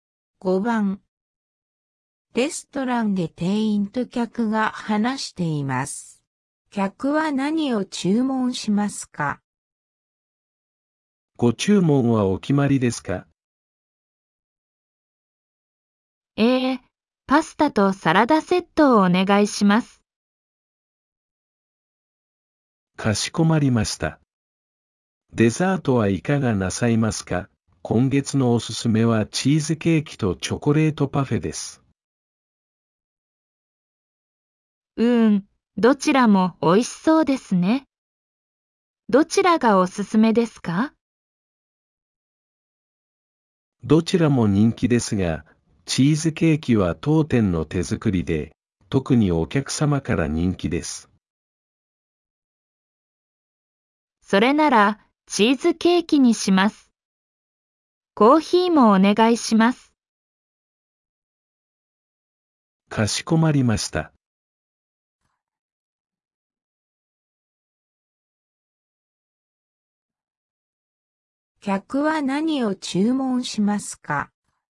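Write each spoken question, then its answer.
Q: 客は何を注文しますか?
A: パスタとサラダセット、チーズケーキ、コーヒー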